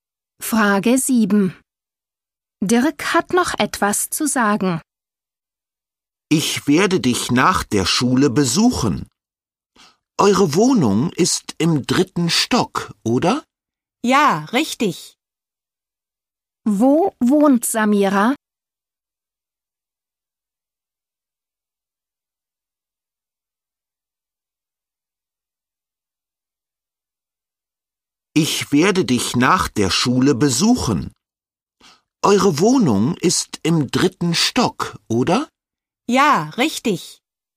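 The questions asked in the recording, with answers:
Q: Wo wohnt Samira?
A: Im dritten Stock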